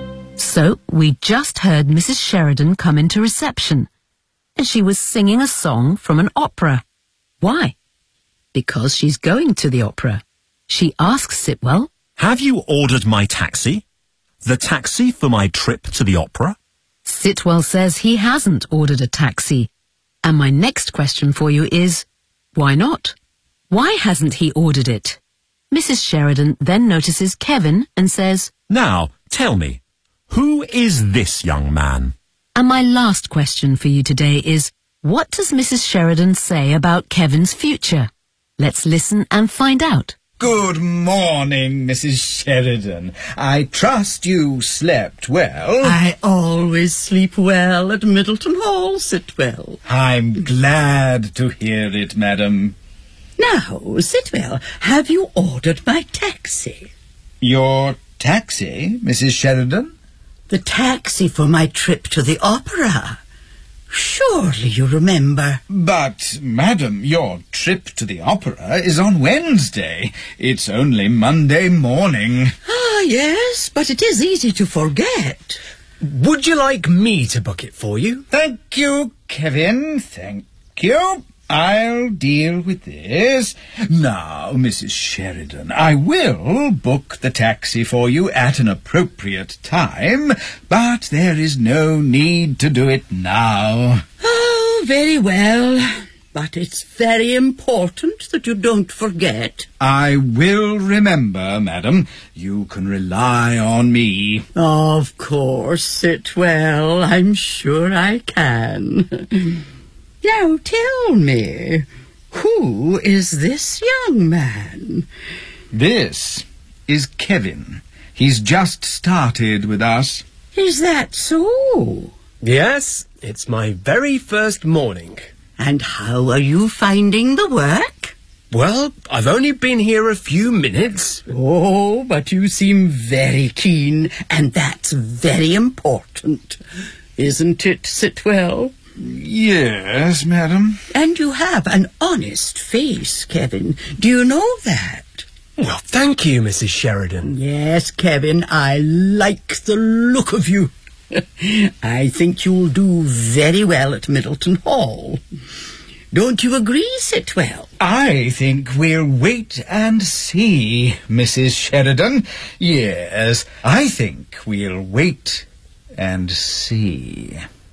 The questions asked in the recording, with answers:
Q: Why hasn't he ordered it?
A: your trip to the opera is on Wednesday.

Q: Sheridan say about Kevin's future?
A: I think you will do very well at Middleton Hall.